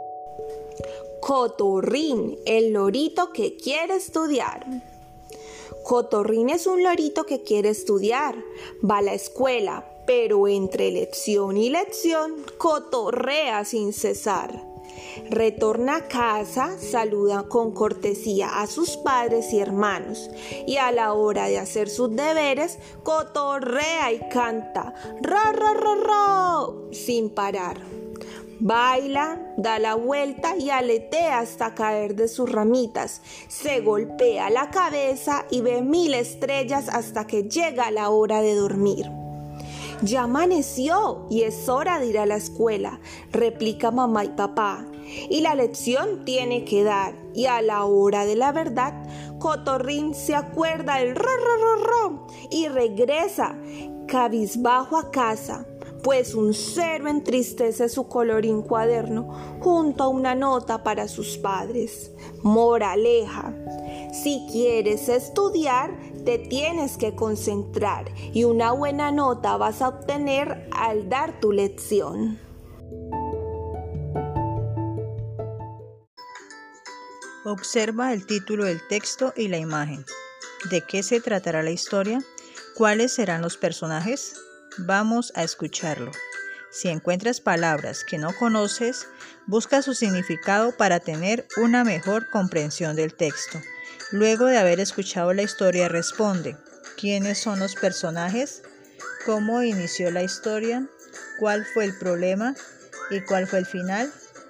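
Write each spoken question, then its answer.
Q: ¿quiénes son los personajes?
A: Cotorrín, el lorito, y sus padres y hermanos

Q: ¿Cómo inició la historia?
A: Cotorrín, un lorito que quiere estudiar, va a la escuela pero cotorrea sin cesar

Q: ¿Cuál fue el problema?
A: En lugar de hacer sus deberes, cotorreaba, cantaba y bailaba sin parar

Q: ¿Y cuál fue el final?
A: Sacó un cero y regresó cabizbajo a casa con una nota para sus padres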